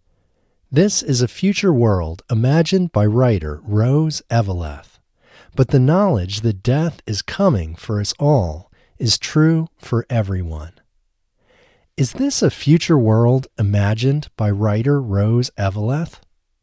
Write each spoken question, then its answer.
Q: Is this a future world imagined by writer Rose Eveleth?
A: Yes, this is a future world imagined by writer Rose Eveleth.